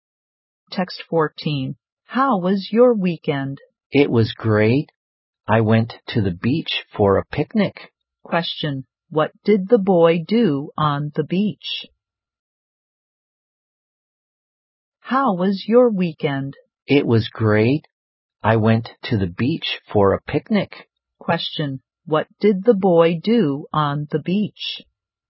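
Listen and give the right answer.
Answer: He had a picnic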